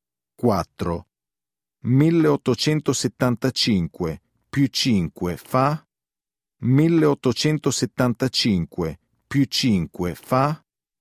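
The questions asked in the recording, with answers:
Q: 1875 più 5 fa?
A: 1880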